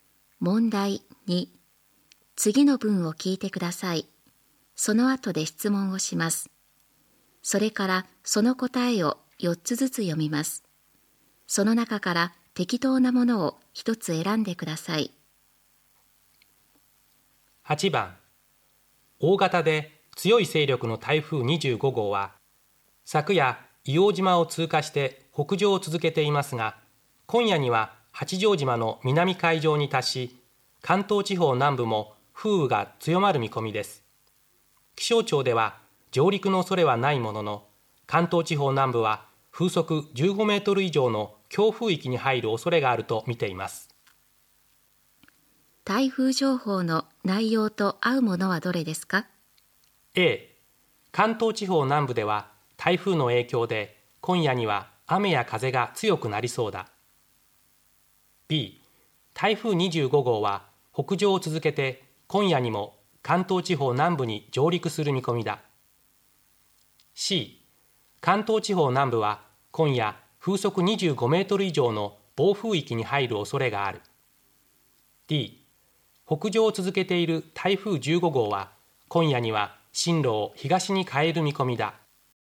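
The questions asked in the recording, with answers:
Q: 台風情報の内容と合うものはどれですか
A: A: 関東地方南部では台風の影響で今夜には雨や風が強くなりそうだ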